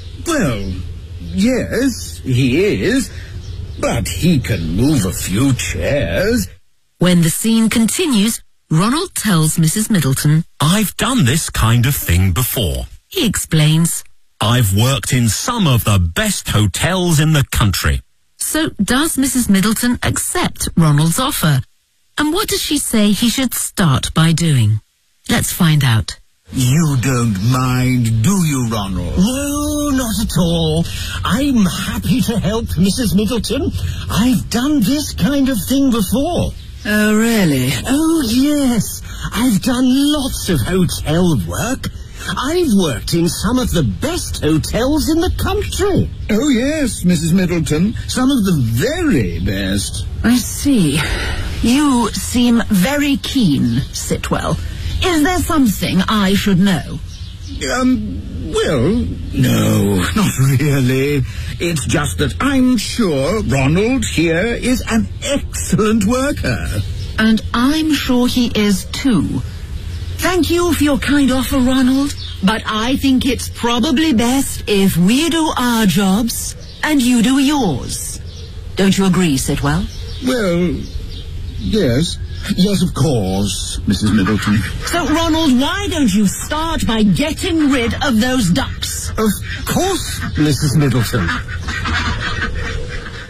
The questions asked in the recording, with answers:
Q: So does Mrs. Middleton accept Ronald's offer?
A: No, she says to him,